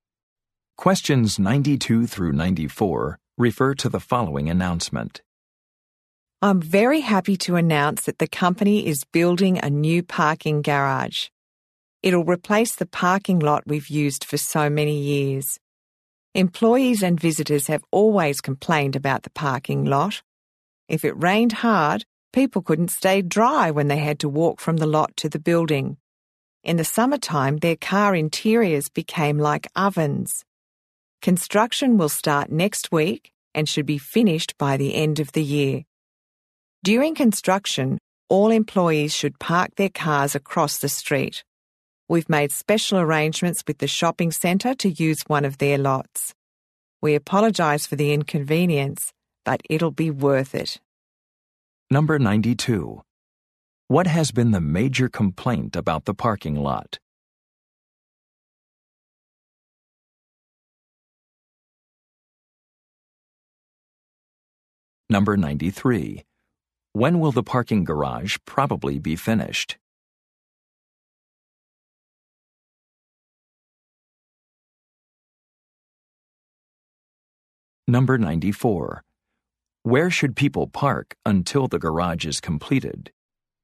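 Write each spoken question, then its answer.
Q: What has been the major complaint about the parking lot?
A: It is uncovered: people get wet in rain and cars get hot in summer

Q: When will the parking garage probably be finished?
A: By the end of the year

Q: Where should people park until the garage is completed?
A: Across the street, in a shopping centre lot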